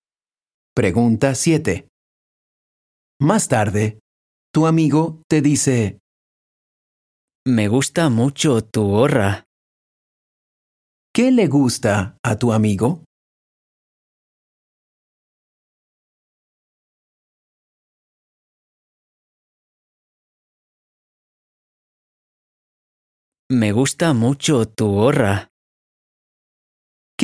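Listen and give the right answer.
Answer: Tu gorra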